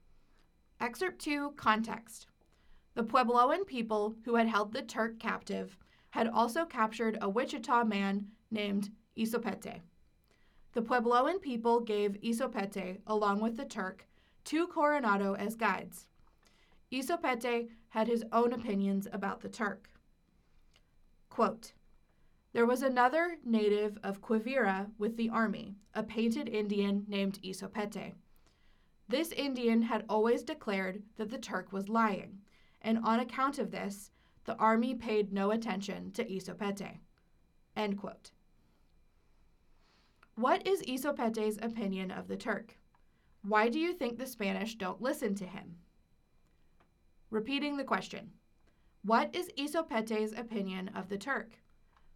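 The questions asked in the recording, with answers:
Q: What is Isopete's opinion of the Turk?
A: He thought the Turk was lying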